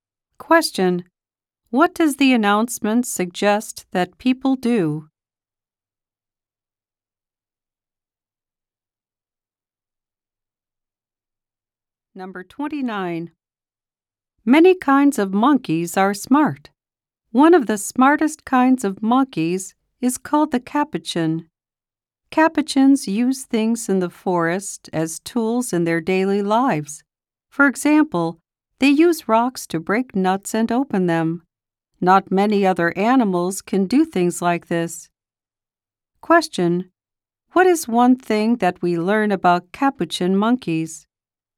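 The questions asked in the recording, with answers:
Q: What is one thing that we learn about capuchin monkeys?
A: They use things like rocks as tools.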